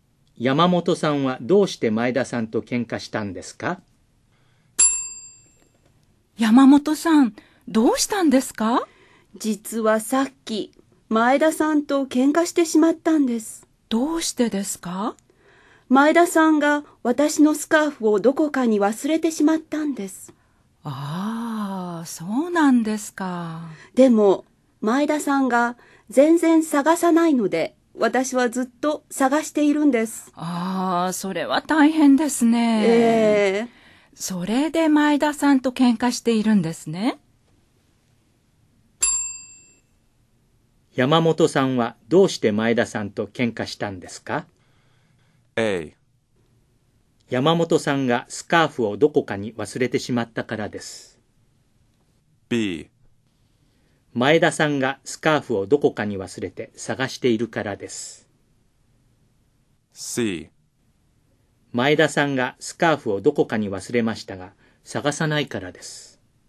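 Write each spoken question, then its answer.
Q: 山本さんはどうして前田さんと喧嘩したんですか?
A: C: 前田さんがスカーフをどこかに忘れましたが、探さないからです。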